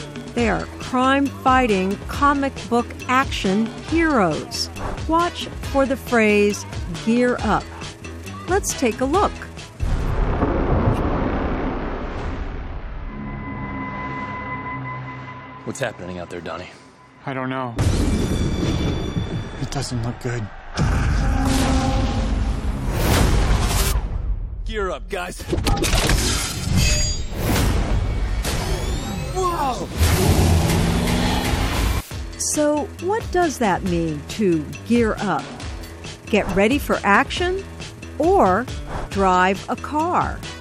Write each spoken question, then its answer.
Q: So, what does that mean to gear up?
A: To gear up means to get ready for action.